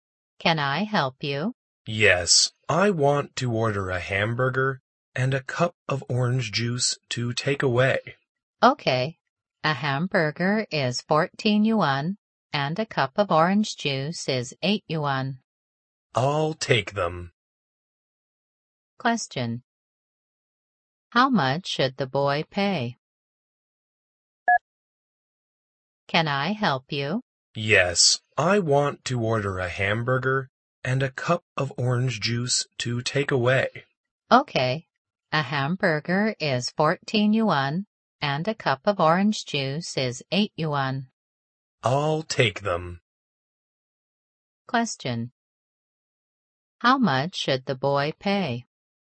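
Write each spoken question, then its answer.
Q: How much should the boy pay?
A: 22 yuan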